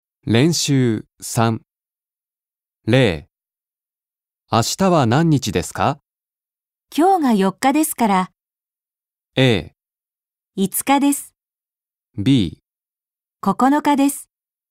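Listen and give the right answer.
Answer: A: 5日です。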